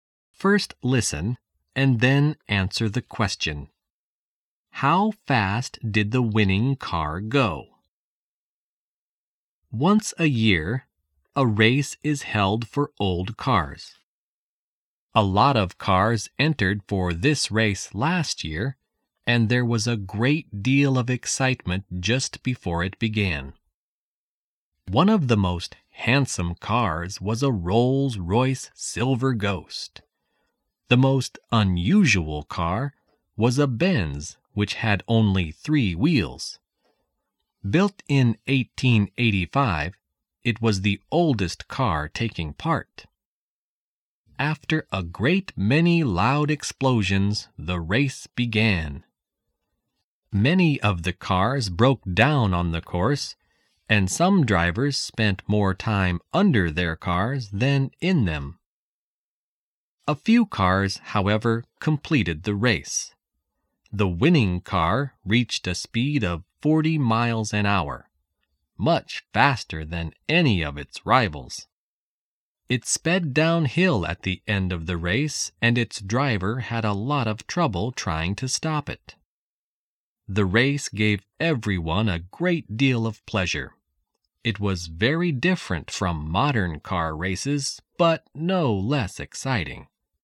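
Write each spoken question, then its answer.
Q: How fast did the winning car go?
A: 40 miles an hour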